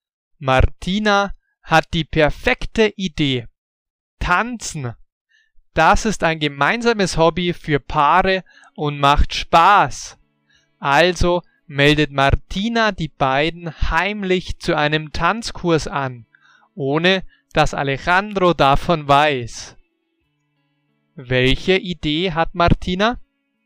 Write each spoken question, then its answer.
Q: Welche Idee hat Martina?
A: Tanzen. Ihre Idee heißt tanzen.